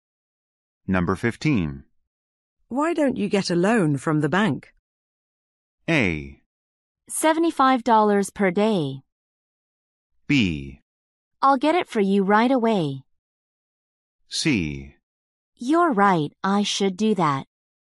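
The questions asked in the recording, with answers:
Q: Why don't you get a loan from the bank?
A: C: You're right, I should do that.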